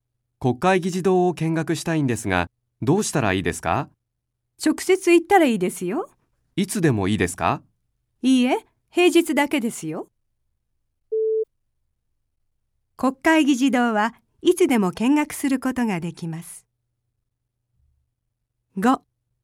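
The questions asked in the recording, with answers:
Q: 国会議事堂はいつでも見学することができます。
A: 正しくない(×):平日だけ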